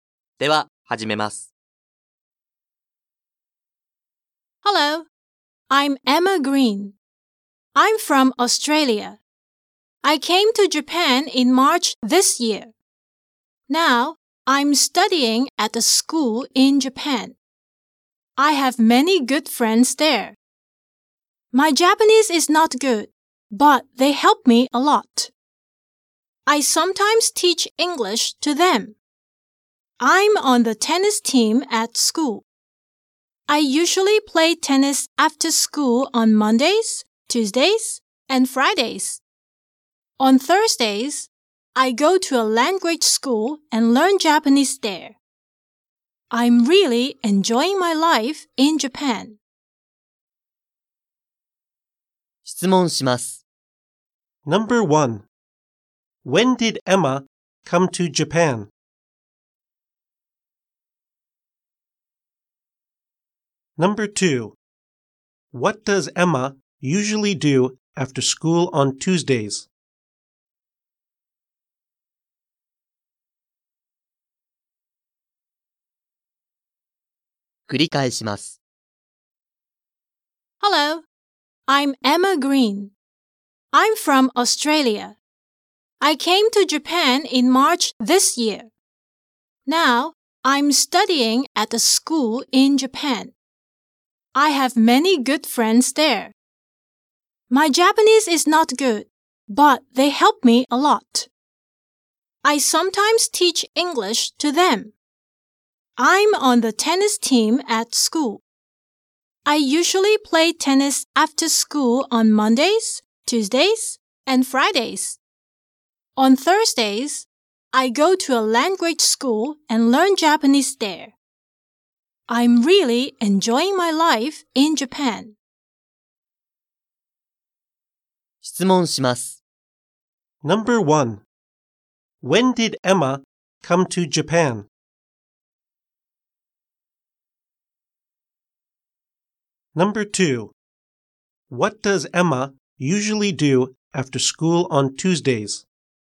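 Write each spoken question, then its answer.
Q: When did Emma come to Japan?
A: In March this year

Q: What does Emma usually do after school on Tuesdays?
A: She plays tennis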